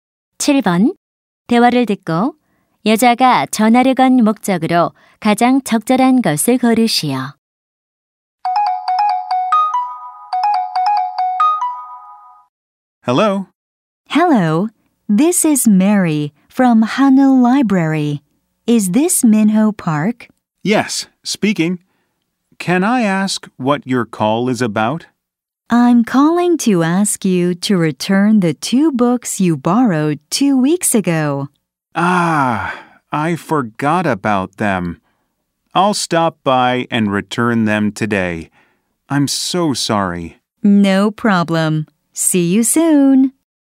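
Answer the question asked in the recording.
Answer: 빌린 책 반납을 요청하려고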